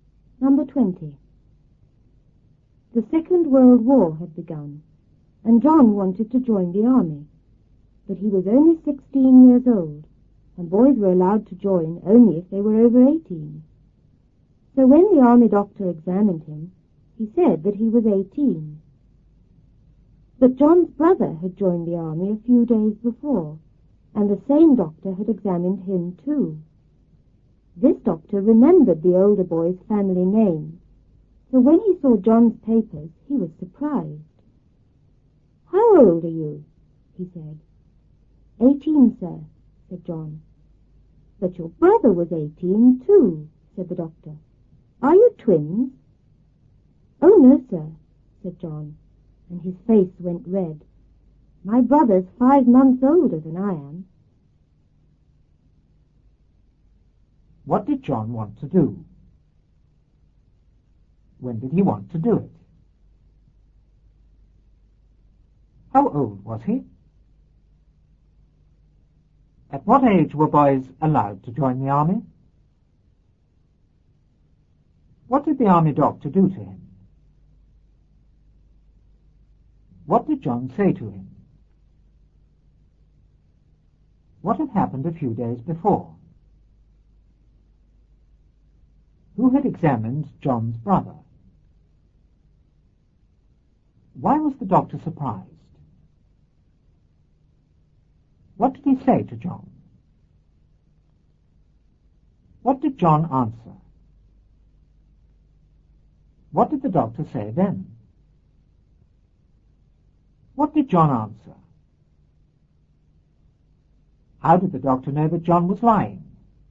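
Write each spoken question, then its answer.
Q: What did John want to do?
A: Join the army

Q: When did he want to do it?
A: When the Second World War had begun

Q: How old was he?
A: 16

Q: At what age were boys allowed to join the army?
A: Over 18

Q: What did the army doctor do to him?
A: He examined him

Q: What did John say to him?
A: That he was 18

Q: What had happened a few days before?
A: John's brother had joined the army

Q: Who had examined John's brother?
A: The same doctor

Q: Why was the doctor surprised?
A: He remembered the family name from John's brother

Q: What did he say to John?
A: How old are you?

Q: What did John answer?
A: 18, sir

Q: What did the doctor say then?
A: But your brother was 18 too. Are you twins?

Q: What did John answer?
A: No, my brother's 5 months older than I am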